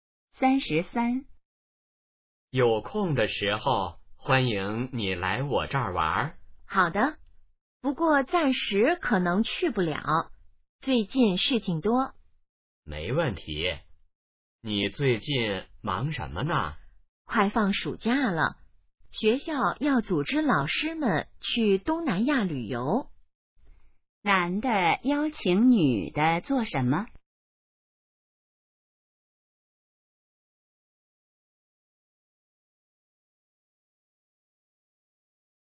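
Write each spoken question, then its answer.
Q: 男的邀请女的做什么?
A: 来他那儿玩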